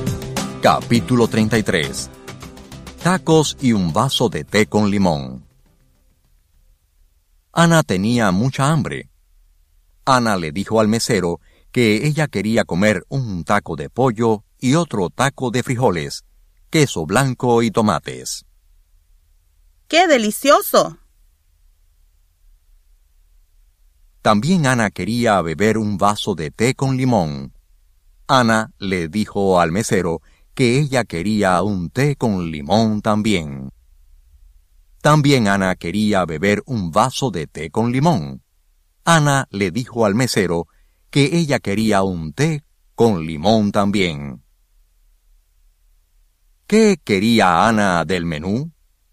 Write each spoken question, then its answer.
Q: ¿Qué quería Ana del menú?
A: Ana quería comer un taco de pollo y otro taco de frijoles, queso blanco y tomates.